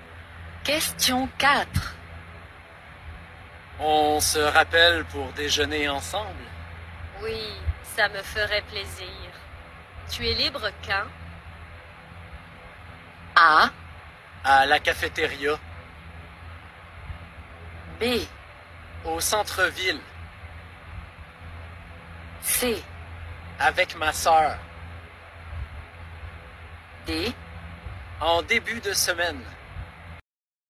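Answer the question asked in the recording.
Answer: D: En début de semaine.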